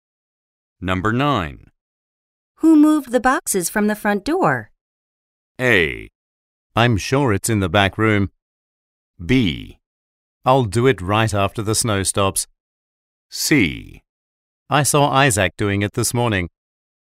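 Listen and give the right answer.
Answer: C: I saw Isaac doing it this morning.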